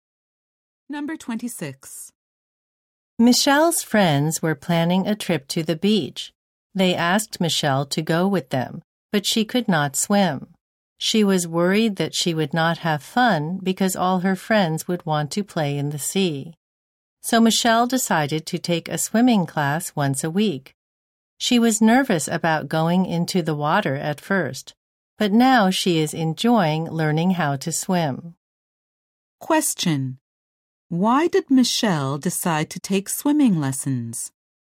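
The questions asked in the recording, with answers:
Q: Why did Michelle decide to take swimming lessons?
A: She wanted to have fun at the beach with her friends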